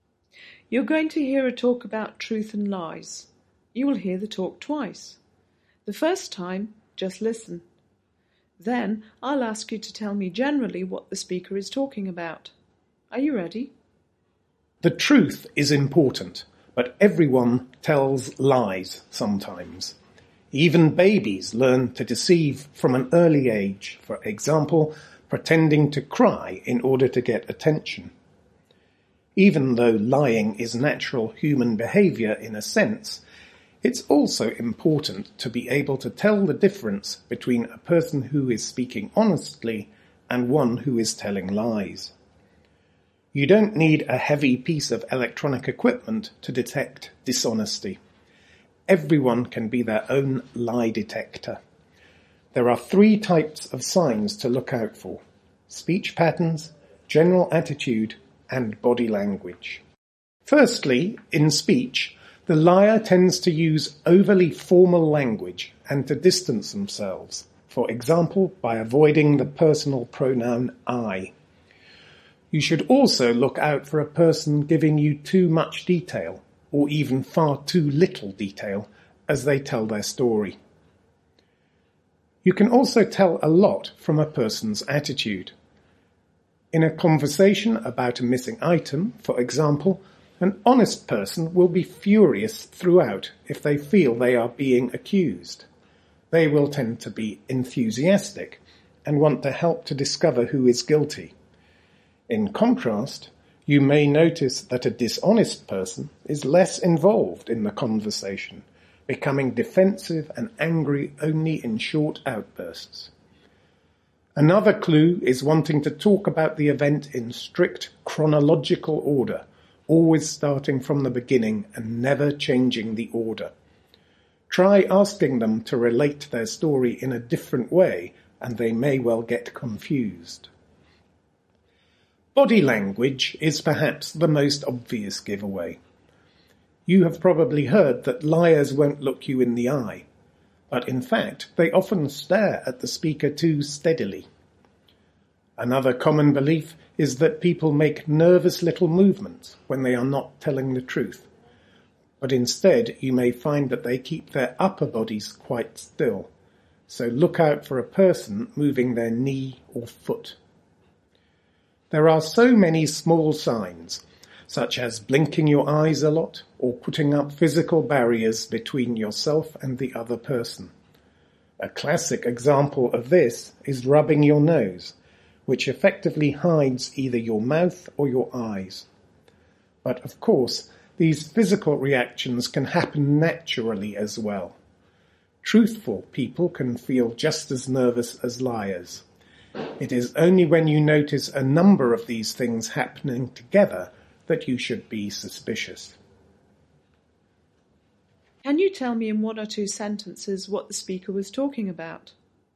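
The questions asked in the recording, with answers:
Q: Can you tell me in one or two sentences what the speaker was talking about?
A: How to tell whether someone is lying, using signs in their speech, attitude and body language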